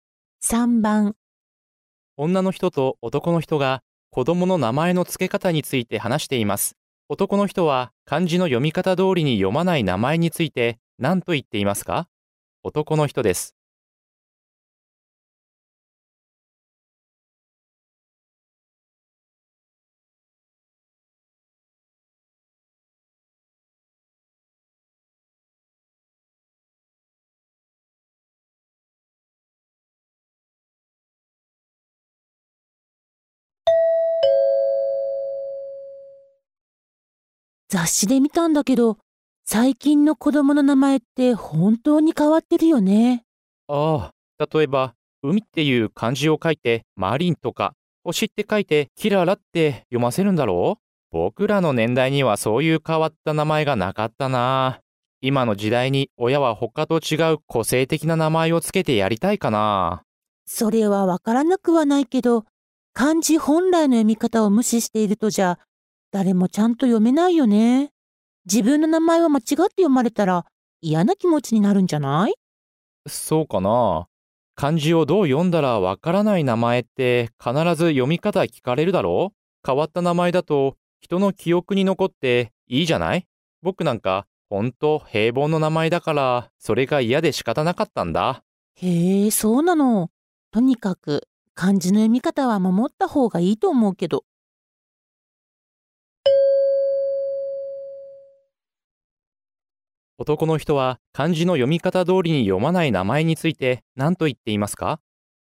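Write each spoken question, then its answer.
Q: 男の人は漢字の読み方通りに読まない名前について何と言っていますか?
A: 変わった名前は人の記憶に残っていい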